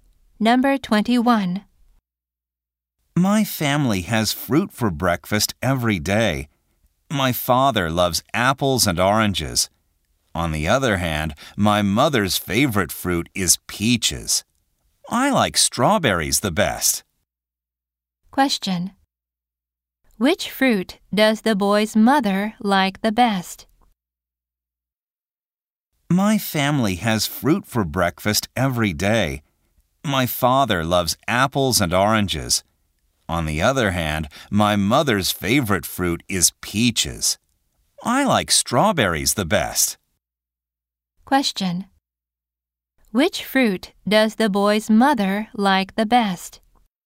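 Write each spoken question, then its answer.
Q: Which fruit does the boy's mother like the best?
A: Peaches.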